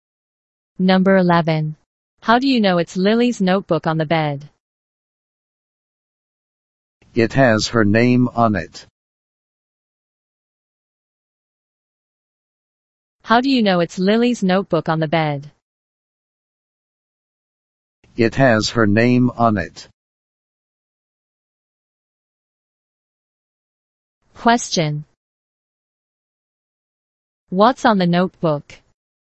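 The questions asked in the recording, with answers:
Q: What's on the notebook?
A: Lily's name.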